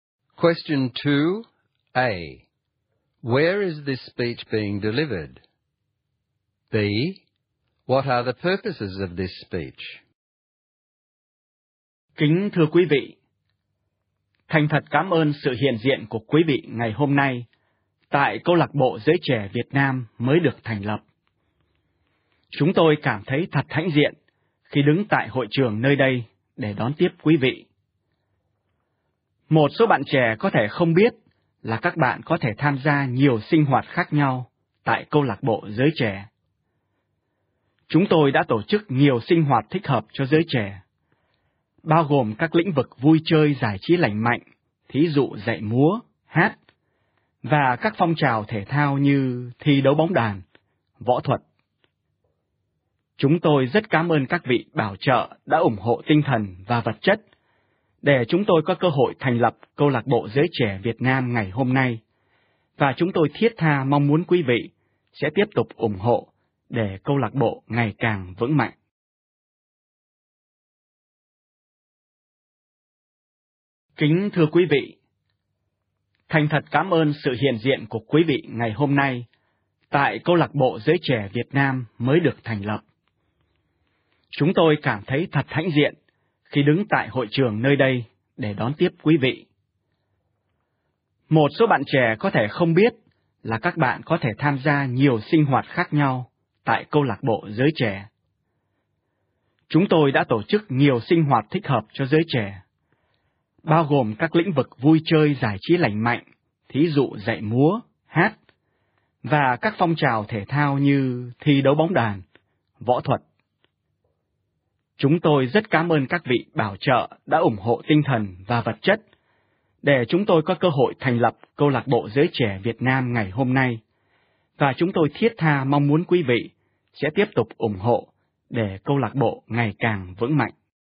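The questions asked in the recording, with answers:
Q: Where is this speech being delivered?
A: At the newly founded Vietnamese Youth Club's hall

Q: What are the purposes of this speech?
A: To welcome guests, tell young people about the club's activities (dance, singing, sports, martial arts), thank sponsors and ask for their continued support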